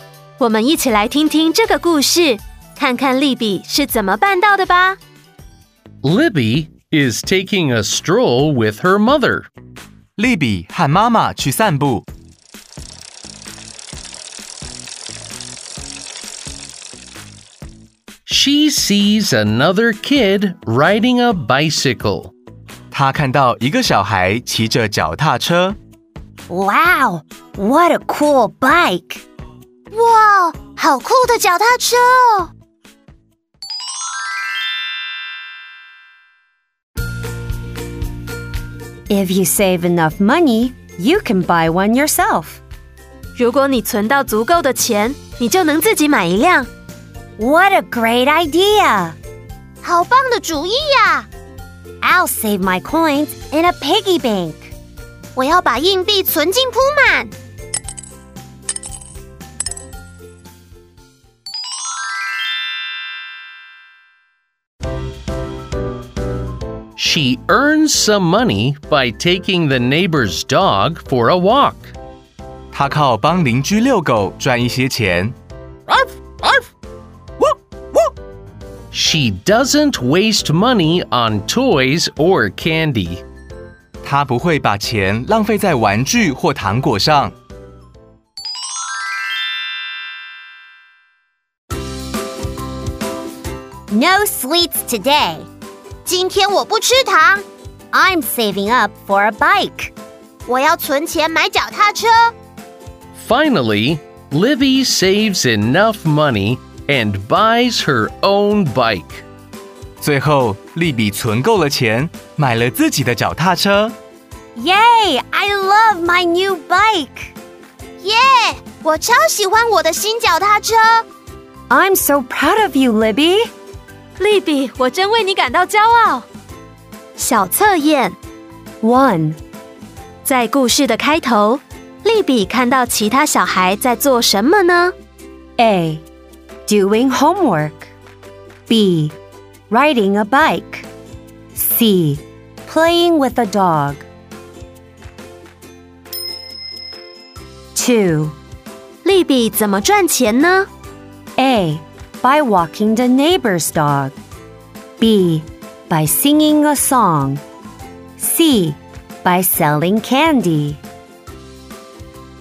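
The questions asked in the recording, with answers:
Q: 在故事的开头,莉比看到其他小孩在做什么呢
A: B: Riding a bike.

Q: 莉比怎么赚钱呢?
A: A: By walking the neighbor's dog.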